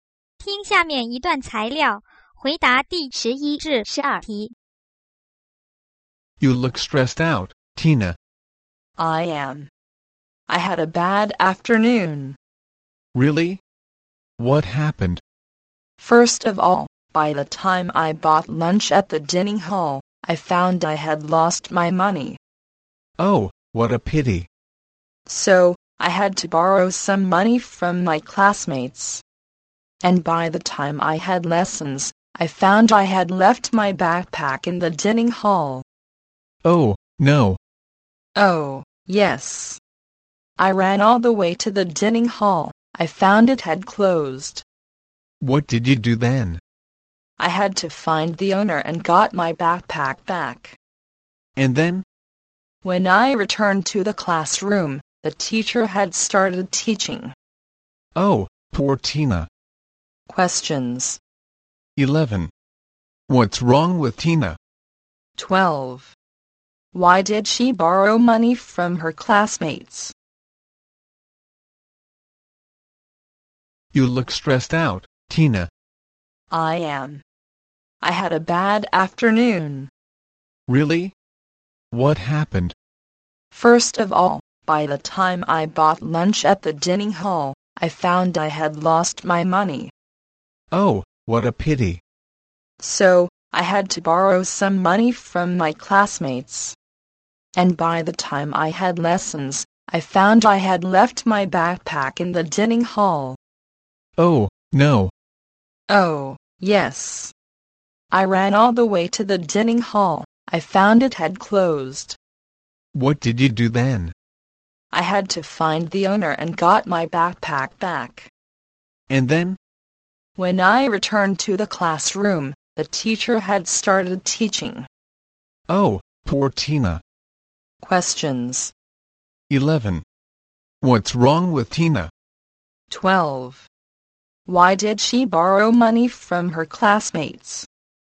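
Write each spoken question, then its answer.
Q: What's wrong with Tina?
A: She had a bad afternoon and is stressed out

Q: Why did she borrow money from her classmates?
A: Because she lost her money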